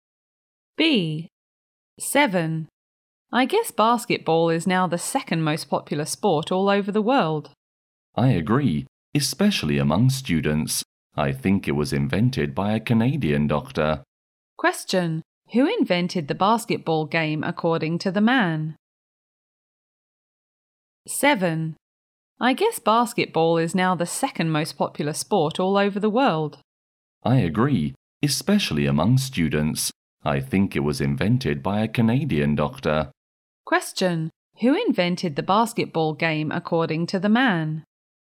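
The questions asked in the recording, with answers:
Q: Who invented the basketball game according to the man?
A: A Canadian doctor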